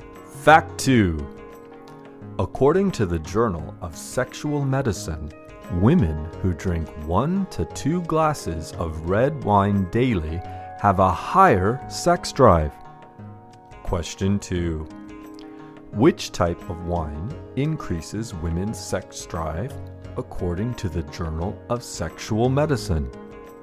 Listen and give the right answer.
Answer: According to the Journal of Sexual Medicine, women who drink one to two glasses of red wine daily have a higher sex drive.